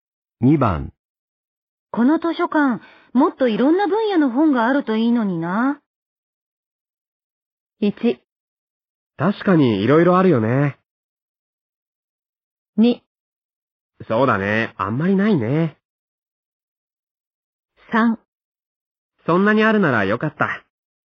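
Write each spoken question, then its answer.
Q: この図書館、もっといろんな分野の本があるといいのにな。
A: 2: そうだね、あんまりないね。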